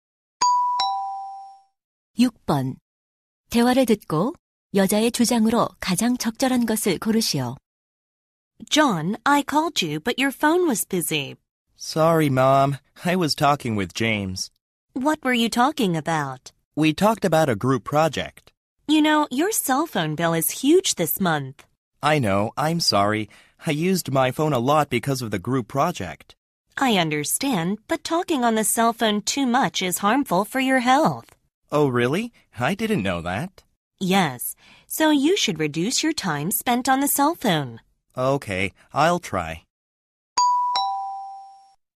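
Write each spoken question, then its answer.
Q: 대화를 듣고 여자의 주장으로 가장 적절한 것을 고르시오.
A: 휴대전화 사용 시간을 줄여야 한다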